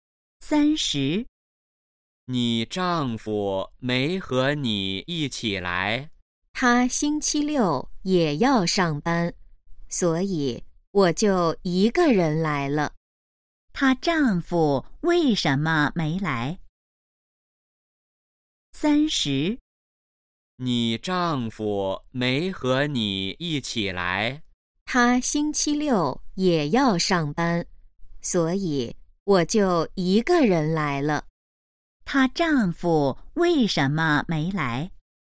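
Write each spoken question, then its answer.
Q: 他丈夫为什么没来?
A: 星期六要上班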